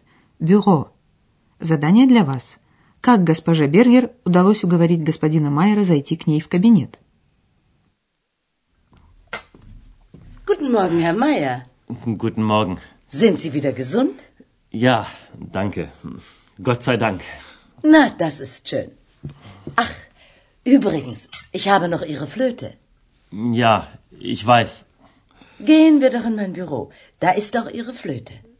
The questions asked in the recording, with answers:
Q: Как госпоже Бергер удалось уговорить господина Майера зайти к ней в кабинет?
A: Она приглашает господина Майера в кабинет, чтобы вернуть ему флейту